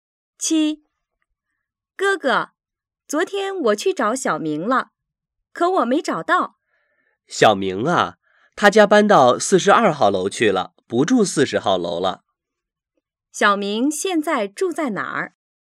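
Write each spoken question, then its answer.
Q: 小明现在住在哪儿?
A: 42号楼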